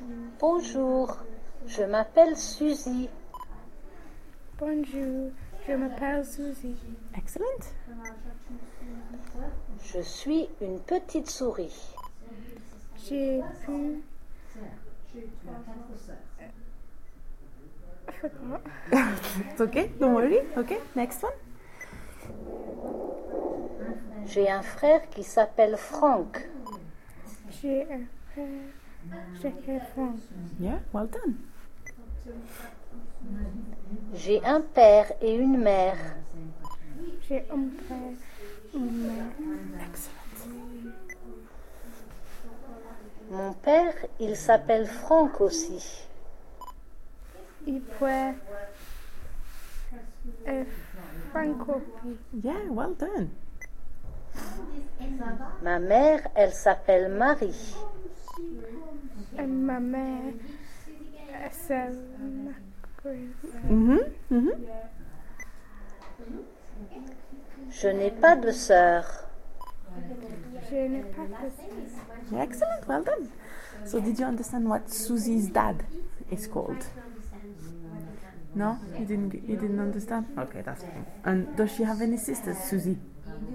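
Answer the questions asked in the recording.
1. Frank
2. No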